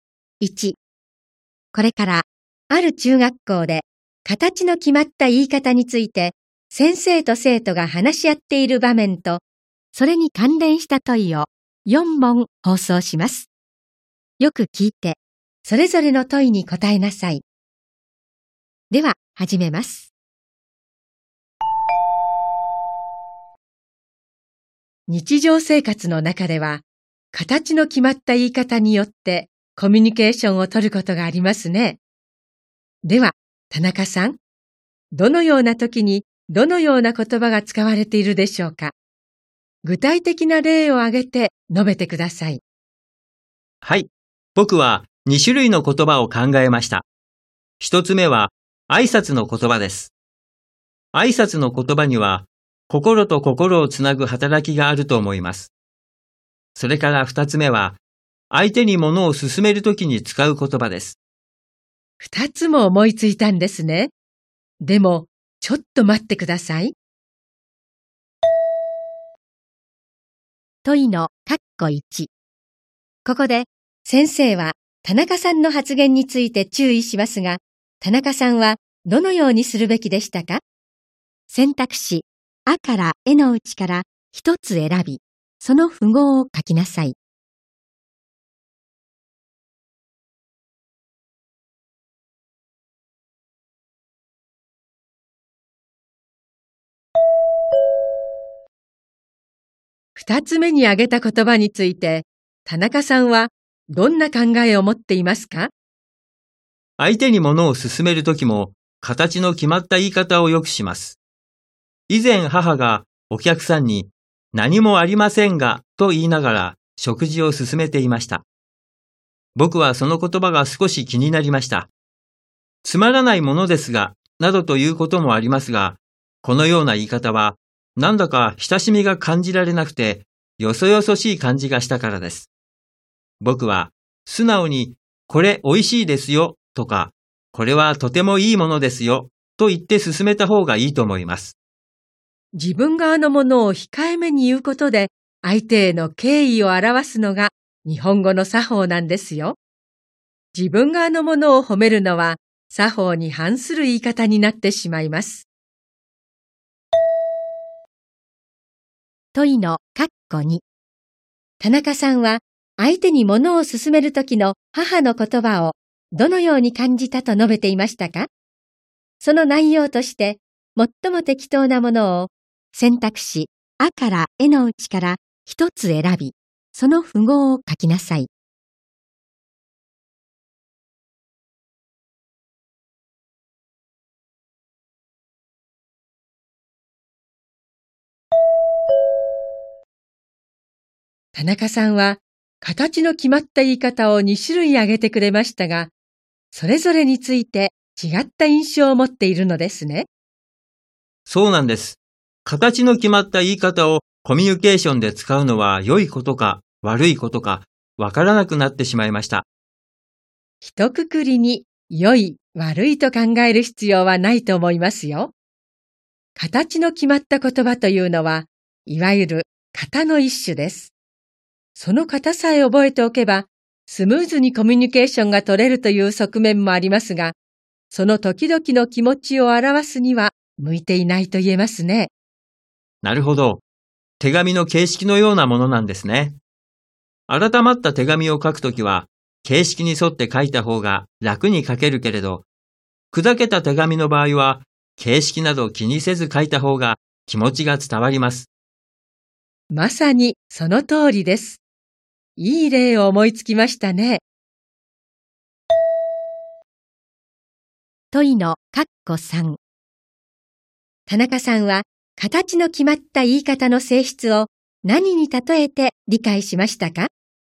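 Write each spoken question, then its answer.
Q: 問いの括弧3。田中さんは形の決まった言い方の性質を何に例えて理解しましたか?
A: 手紙の形式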